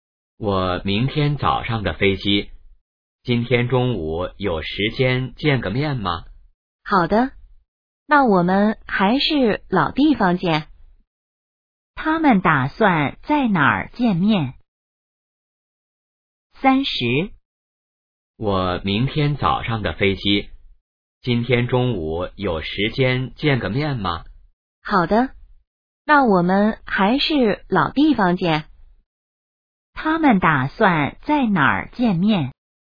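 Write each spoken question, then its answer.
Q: 他们打算在哪儿见面?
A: 老地方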